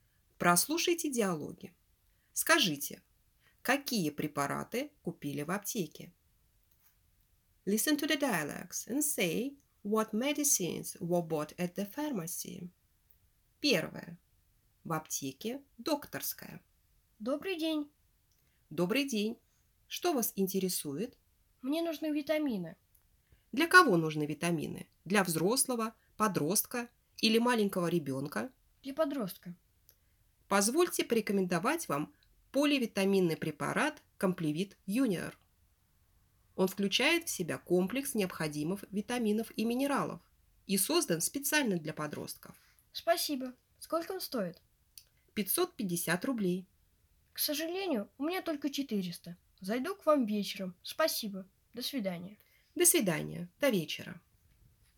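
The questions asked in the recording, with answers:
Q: Скажите, какие препараты купили в аптеке?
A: Ничего не купили: на витамины Компливит Юниор (550 рублей) не хватило денег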